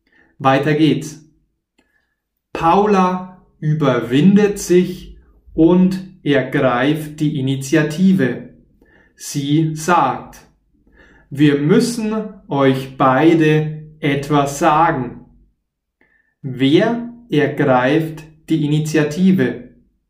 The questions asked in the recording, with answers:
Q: Wer ergreift die Initiative?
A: Paula, sie ergreift die Initiative.